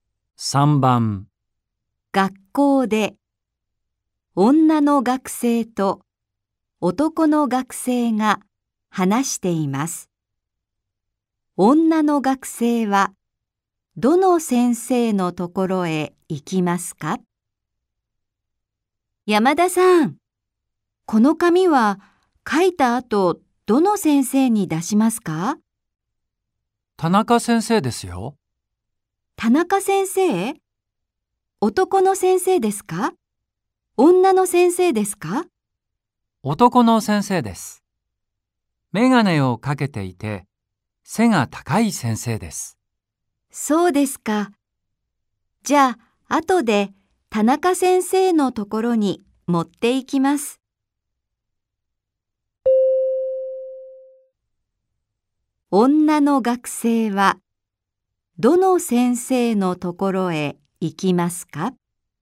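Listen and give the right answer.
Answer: 田中先生(メガネをかけていて背が高い男の先生)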